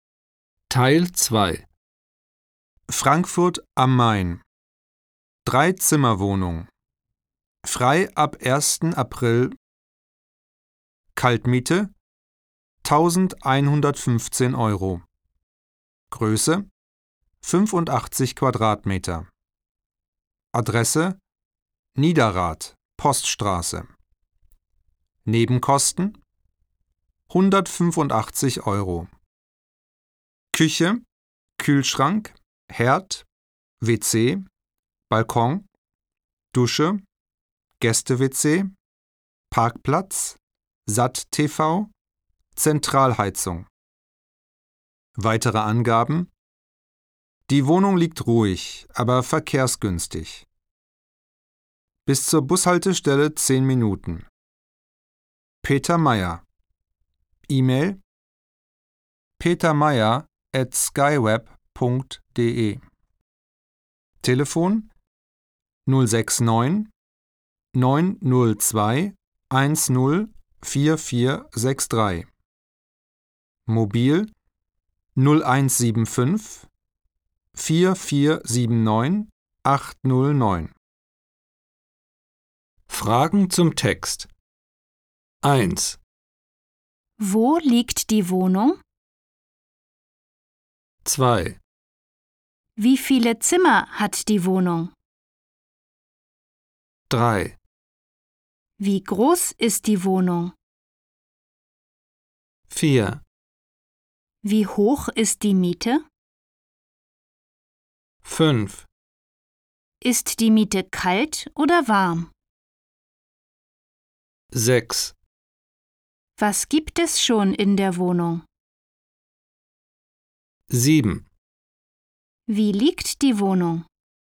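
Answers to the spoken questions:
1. In Frankfurt am Main, Niederrad, Poststraße
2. Drei
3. 85 Quadratmeter
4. 1115 Euro kalt, plus 185 Euro Nebenkosten
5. Kalt
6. Küche, Kühlschrank, Herd, WC, Balkon, Dusche, Gäste-WC, Parkplatz, SAT-TV, Zentralheizung
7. Ruhig, aber verkehrsgünstig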